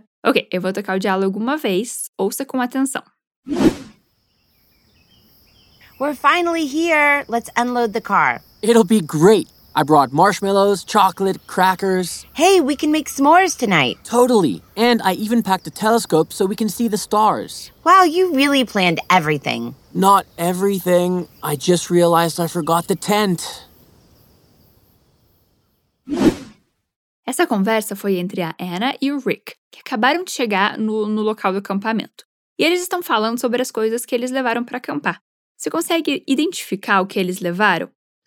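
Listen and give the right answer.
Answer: Marshmallows, chocolate, bolachas (crackers) e um telescópio (esqueceram a barraca)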